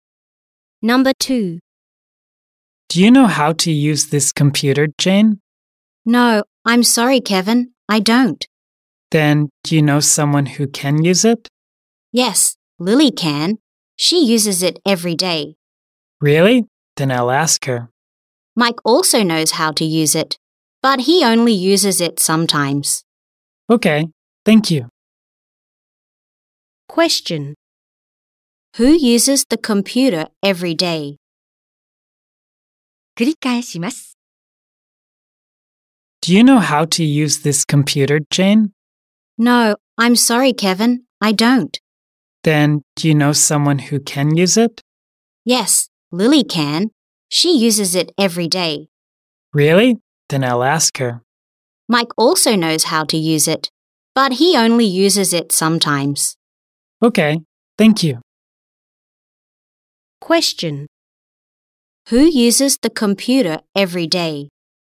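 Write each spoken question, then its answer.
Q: Who uses the computer every day?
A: Lily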